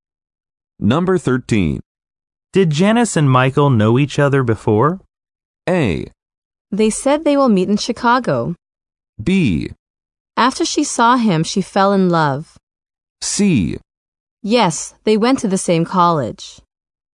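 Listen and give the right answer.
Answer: C: Yes, they went to the same college.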